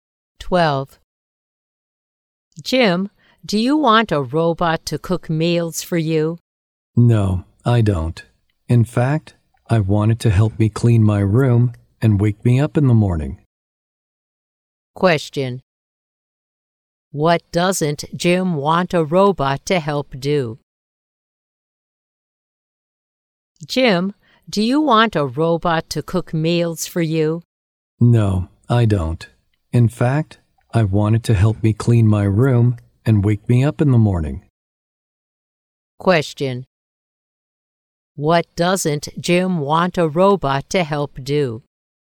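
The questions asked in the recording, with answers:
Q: What doesn't Jim want a robot to help do?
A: Cook meals.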